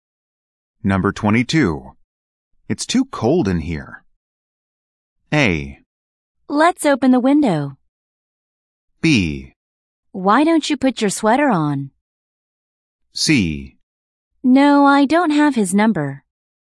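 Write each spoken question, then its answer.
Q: It's too cold in here.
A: B: Why don't you put your sweater on?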